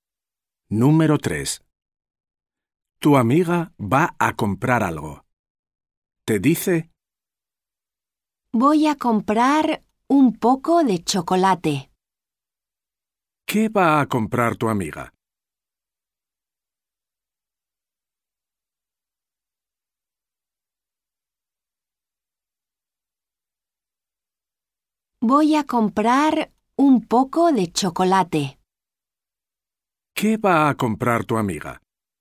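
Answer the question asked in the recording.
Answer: Un poco de chocolate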